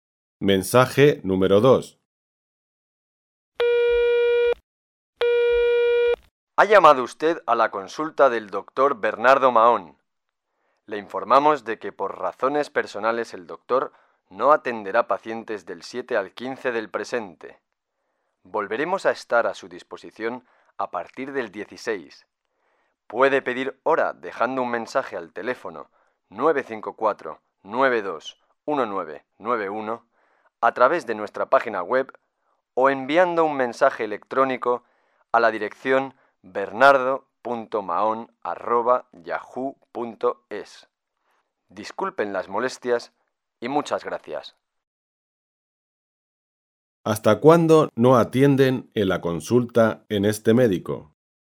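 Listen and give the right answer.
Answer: Hasta el 15 (vuelven a atender a partir del 16)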